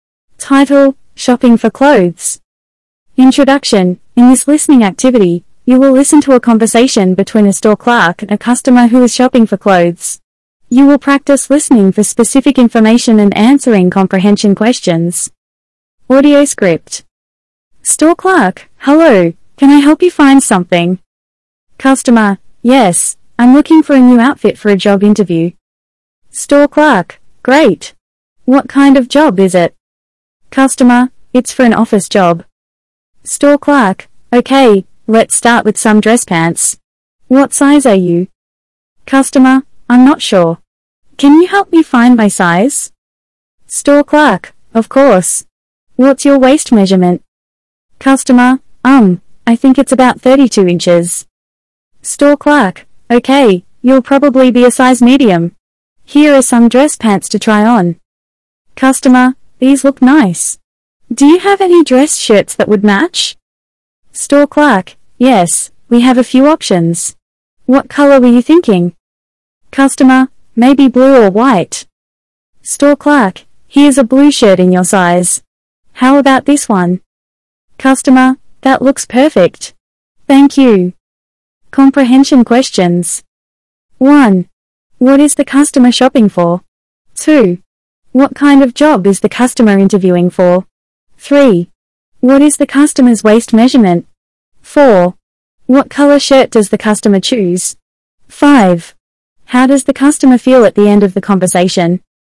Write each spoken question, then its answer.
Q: What is the customer shopping for?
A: The customer is shopping for a new outfit.

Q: What kind of job is the customer interviewing for?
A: The customer is interviewing for an office job.

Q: What is the customer's waist measurement?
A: The customer's waist measurement is about 32 inches.

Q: What color shirt does the customer choose?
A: The customer chooses a blue shirt.

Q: How does the customer feel at the end of the conversation?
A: The customer feels grateful slash thankful slash satisfied.